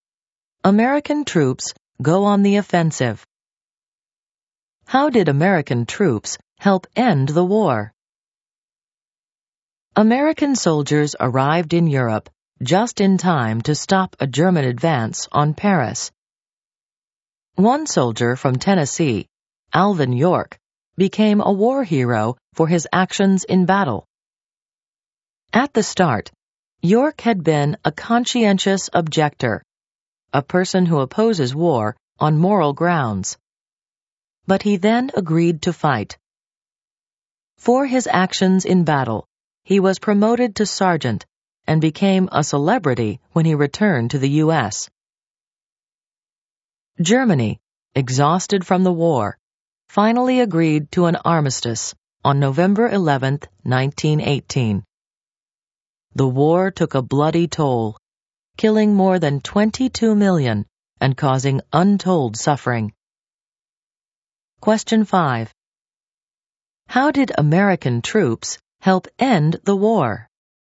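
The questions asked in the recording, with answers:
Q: How did American troops help end the war?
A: They arrived in time to stop a German advance on Paris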